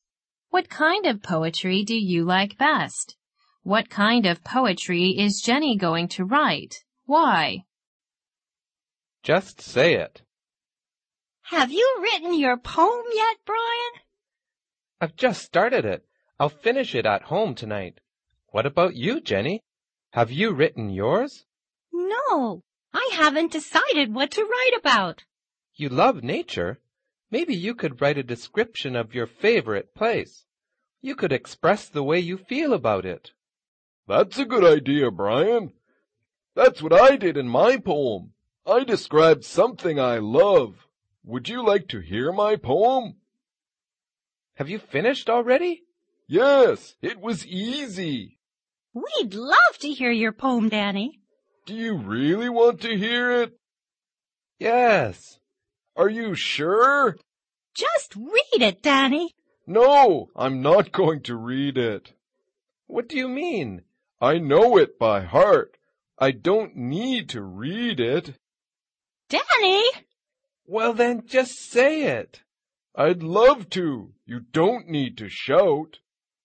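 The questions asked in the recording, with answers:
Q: What kind of poetry is Jenny going to write?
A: A description of her favorite place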